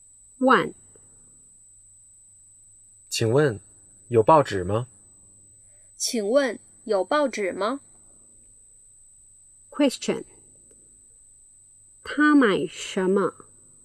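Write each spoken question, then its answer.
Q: 他买什么?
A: 报纸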